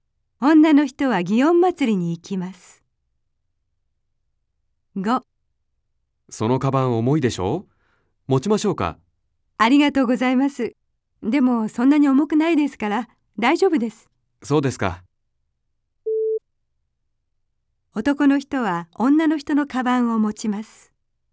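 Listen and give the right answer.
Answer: いいえ(×)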